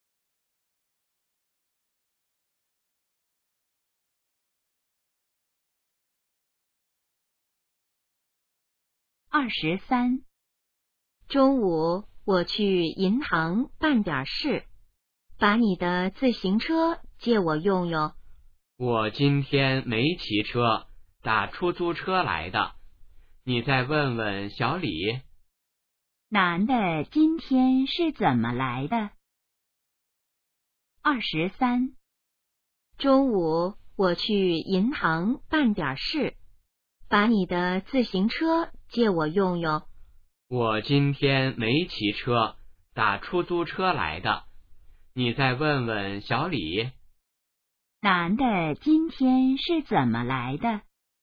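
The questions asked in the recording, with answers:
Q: 男的今天是怎么来的?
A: 打出租车来的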